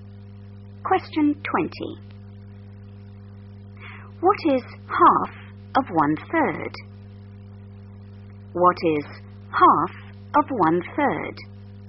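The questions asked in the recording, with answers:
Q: What is half of one-third?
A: 1/6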